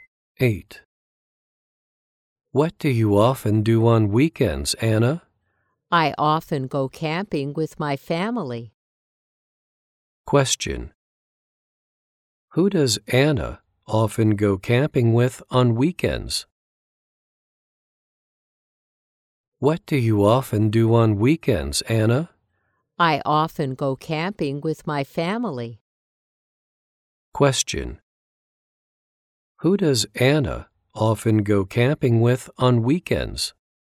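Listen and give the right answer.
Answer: Her family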